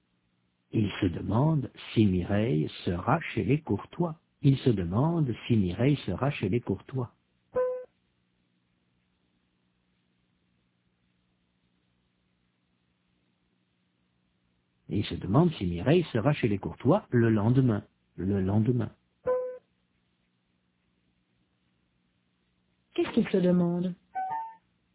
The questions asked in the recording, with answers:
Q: Qu'est-ce qu'il se demande ?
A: Si Mireille sera chez les Courtois le lendemain.